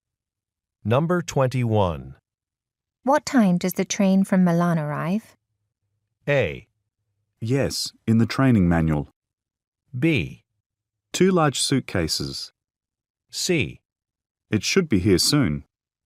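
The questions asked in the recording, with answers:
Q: What time does the train from Milan arrive?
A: C: It should be here soon.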